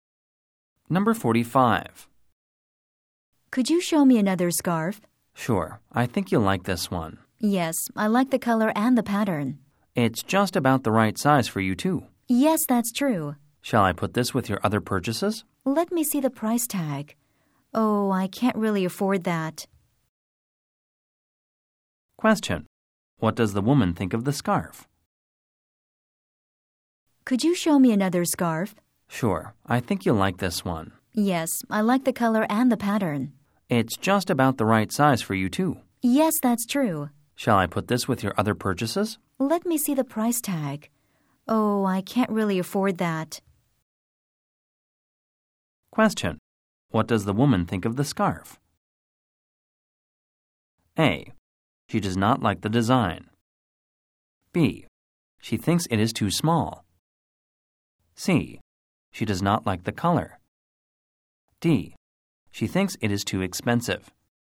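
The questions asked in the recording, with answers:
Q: What does the woman think of the scarf?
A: D: She thinks it is too expensive.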